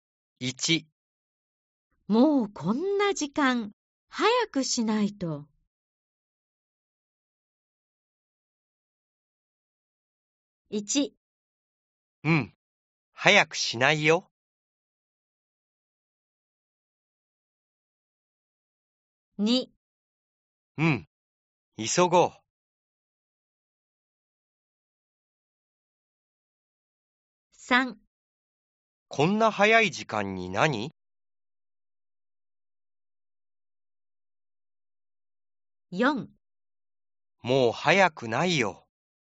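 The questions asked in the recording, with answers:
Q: もうこんな時間、早くしないと。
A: 2: うん、急ごう。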